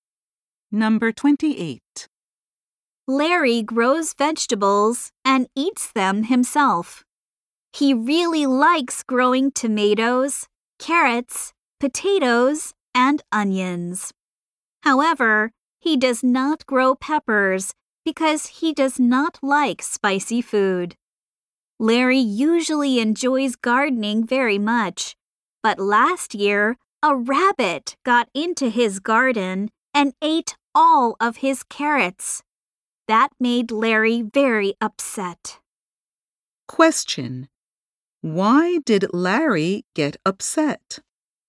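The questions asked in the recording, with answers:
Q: Why did Larry get upset?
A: A rabbit ate all of his carrots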